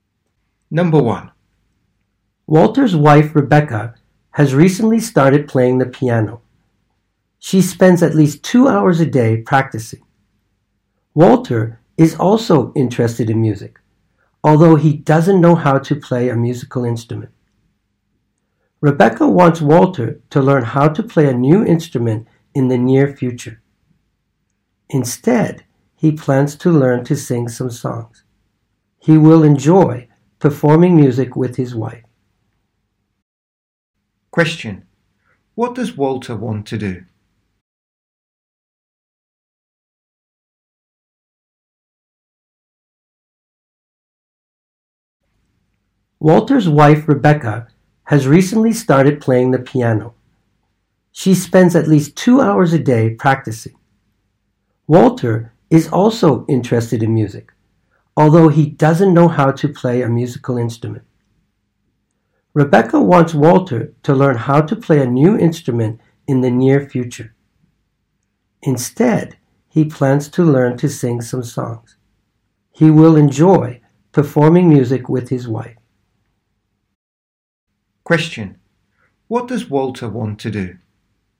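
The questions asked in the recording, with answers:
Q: Question: what does Walter want to do?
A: Learn to sing some songs and perform music with his wife.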